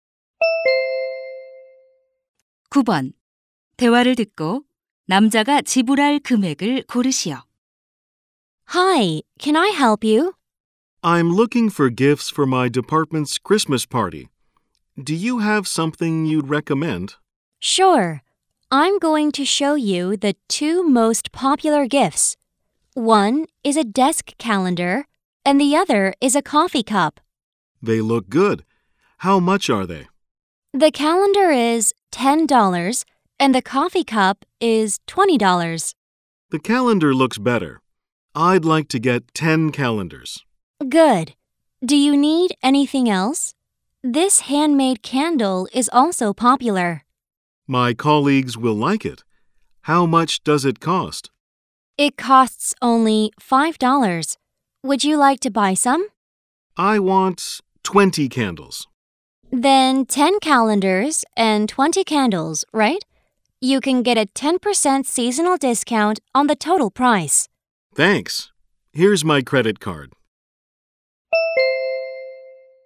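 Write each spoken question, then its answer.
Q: 대화를 듣고 남자가 지불할 금액을 고르시오.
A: $180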